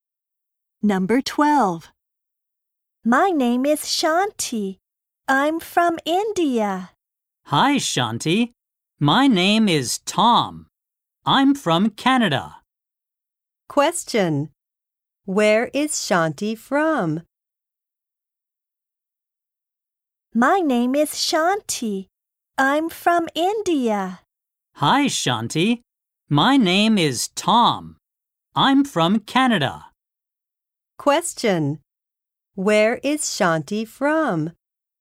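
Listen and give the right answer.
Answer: India.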